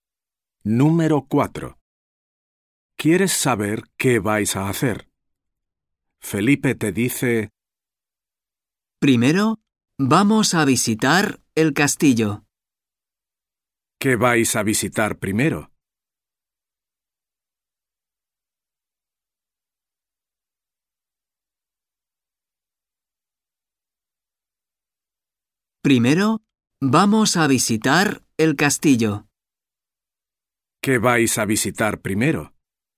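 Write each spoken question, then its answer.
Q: ¿Qué vais a visitar primero?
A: El castillo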